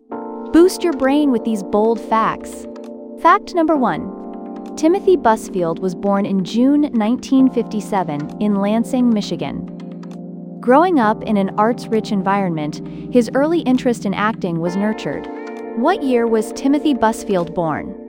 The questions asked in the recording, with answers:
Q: What year was Timothy Busfield born?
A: Correct answer, 1957.